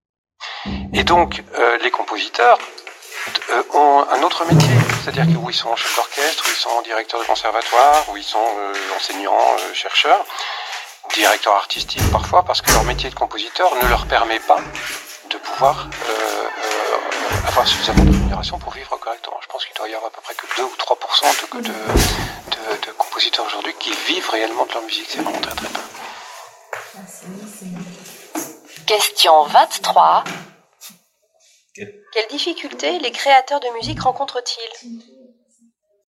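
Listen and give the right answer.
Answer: Ils ne peuvent pas vivre de leur musique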